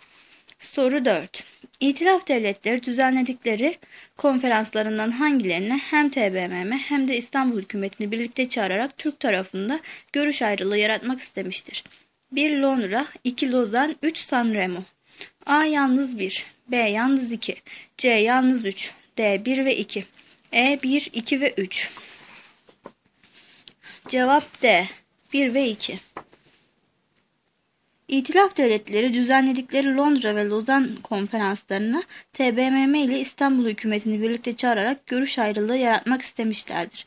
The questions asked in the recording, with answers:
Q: İtilaf devletleri düzenledikleri konferanslarından hangilerine hem TBMM hem de İstanbul hükümetini birlikte çağırarak Türk tarafında görüş ayrılığı yaratmak istemiştir?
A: Cevap D. 1 ve 2.